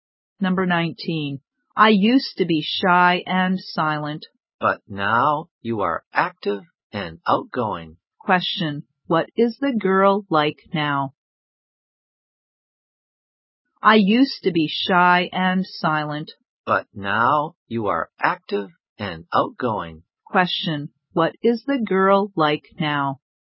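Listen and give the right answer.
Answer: Active and outgoing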